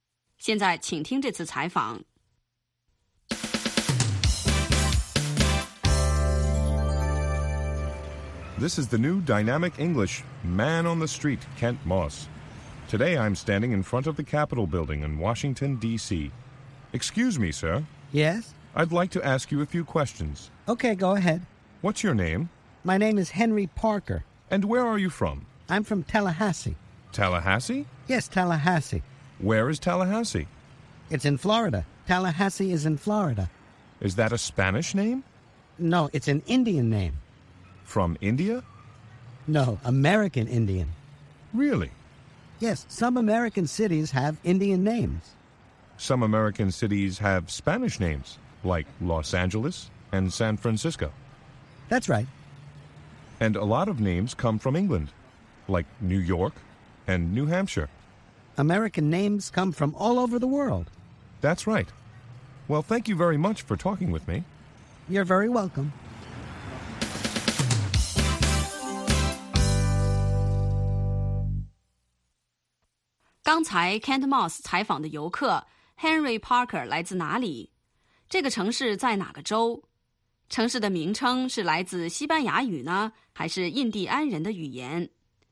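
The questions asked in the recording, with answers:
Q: Kent Moss 采访的游客 Henry Parker 来自哪里?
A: 塔拉哈西(Tallahassee)

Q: 这个城市在哪个州?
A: 佛罗里达州(Florida)

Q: 城市的名称是来自西班牙语呢,还是印第安人的语言?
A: 来自美洲印第安人的语言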